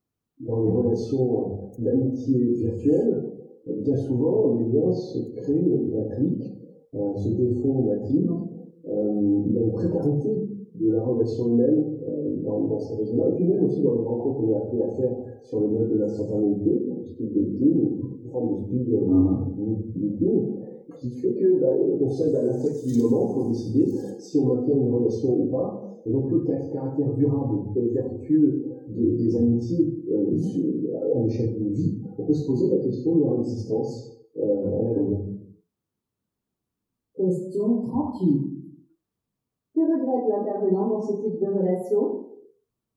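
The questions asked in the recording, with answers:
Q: Que regrette l'intervenant dans ce type de relation?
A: La précarité des liens, qui se font et se défont en un clic, sans durabilité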